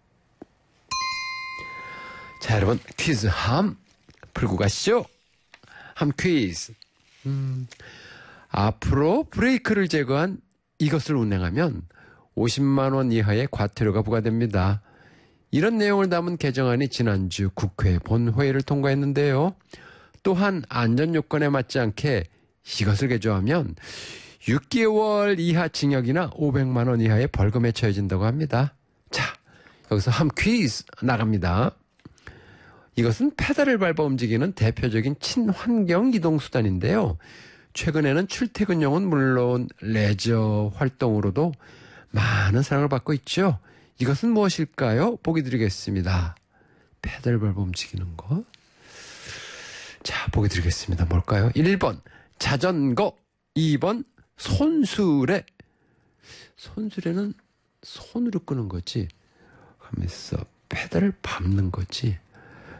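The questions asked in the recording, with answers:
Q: 이것은 무엇일까요?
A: 1번: 자전거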